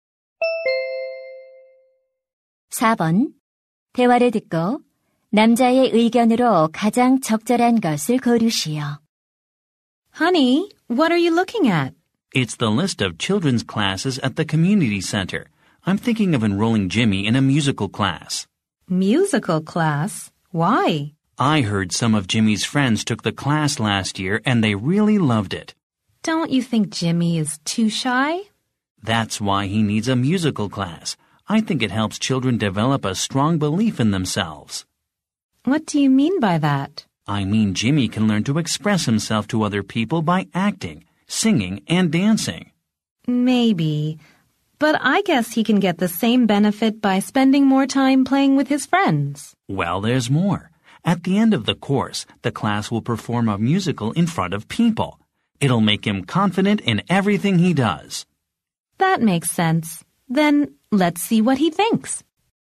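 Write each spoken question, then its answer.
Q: 대화를 듣고 남자의 의견으로 가장 적절한 것을 고르시오.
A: 뮤지컬 수업은 아이의 자신감을 키워 준다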